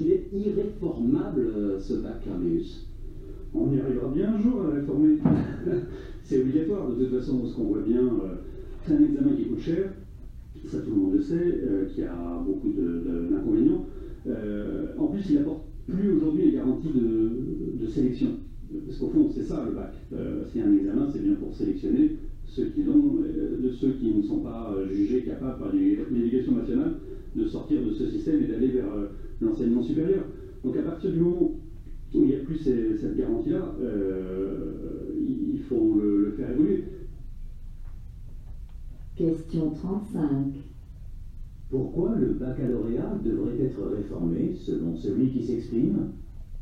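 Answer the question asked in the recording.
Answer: Parce qu'il coûte cher, qu'il a beaucoup d'inconvénients et qu'il n'apporte plus les garanties de sélection.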